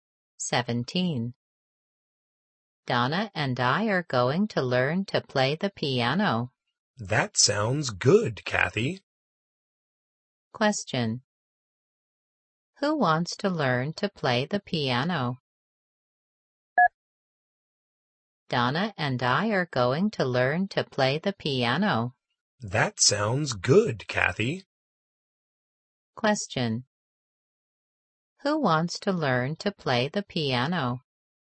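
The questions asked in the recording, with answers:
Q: Who wants to learn to play the piano?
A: Donna and Kathy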